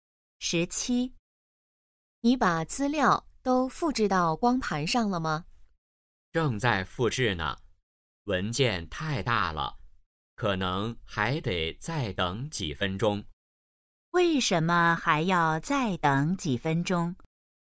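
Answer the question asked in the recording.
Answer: 文件太大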